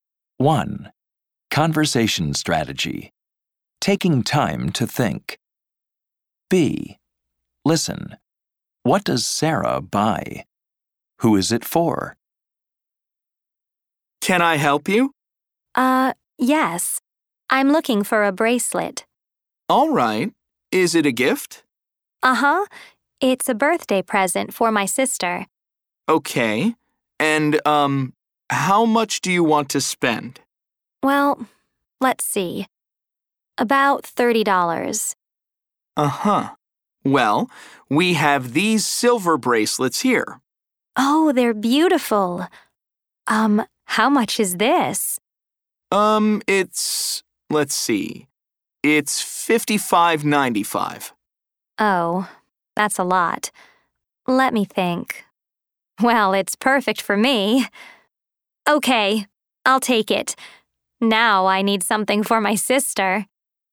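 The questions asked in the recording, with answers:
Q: What does Sarah buy?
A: A silver bracelet

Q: Who is it for?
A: Herself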